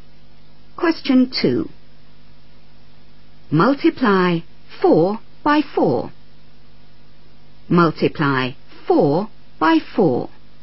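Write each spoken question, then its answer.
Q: Multiply 4 by 4.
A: 16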